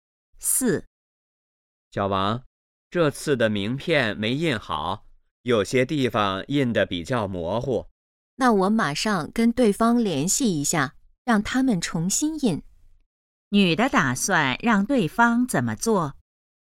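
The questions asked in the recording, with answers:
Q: 女的打算让对方怎么做?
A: 重新印名片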